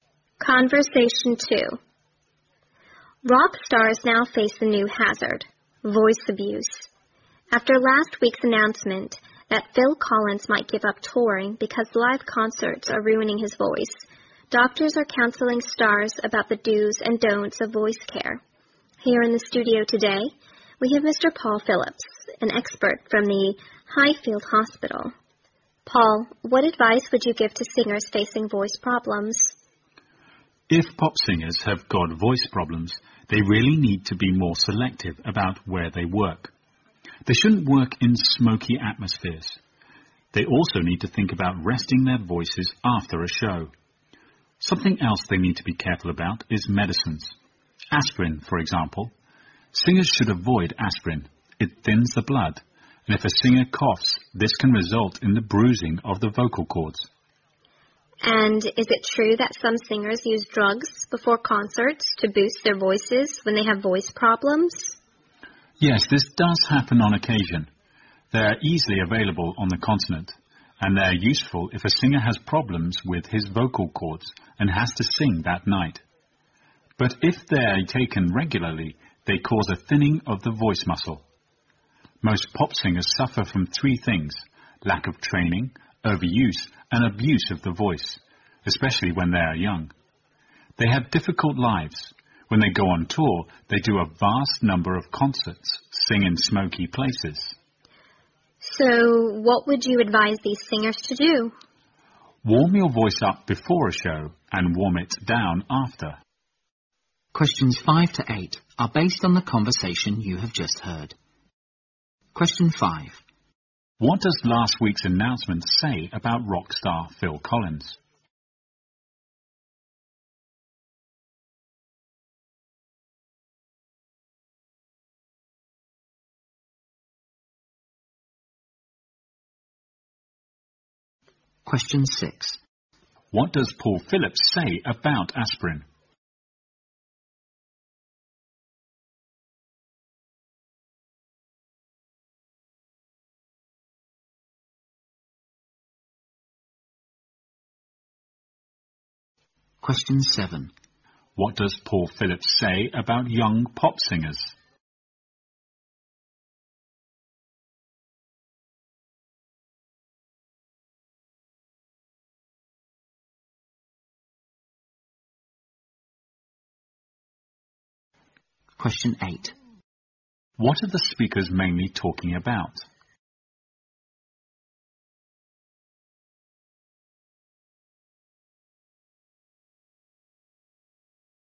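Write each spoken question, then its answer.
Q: What does last week's announcement say about rock star Phil Collins?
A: He might give up touring because live concerts are ruining his voice

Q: What does Paul Phillips say about aspirin?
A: Singers should avoid it; it thins the blood and can bruise the vocal cords

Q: What does Paul Phillips say about young pop singers?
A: They lack training and overuse and abuse their voices

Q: What are the speakers mainly talking about?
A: Voice care for rock/pop singers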